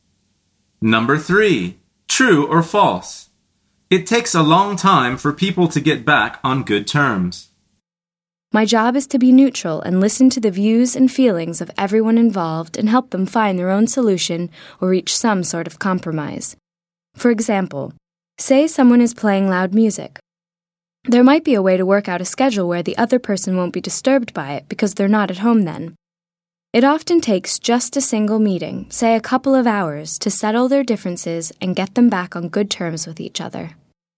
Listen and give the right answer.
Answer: The answer is false.